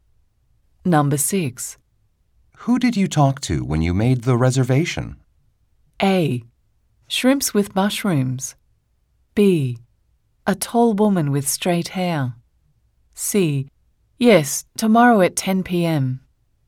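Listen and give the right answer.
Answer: B: A tall woman with straight hair.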